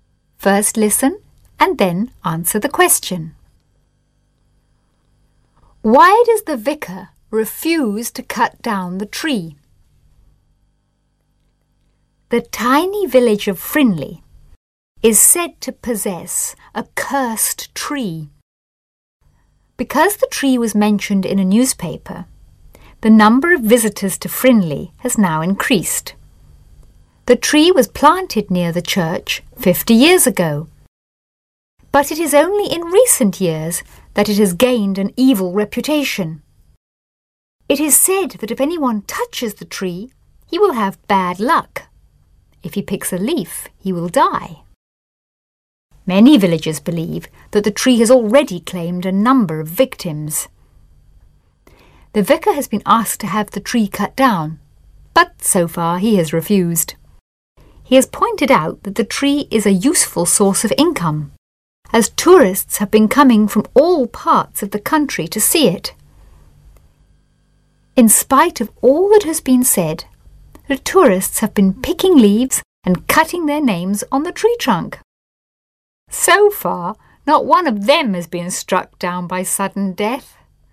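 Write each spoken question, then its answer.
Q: Why does the vicar refuse to cut down the tree?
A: Because it is a useful source of income, as tourists come from all over the country to see it.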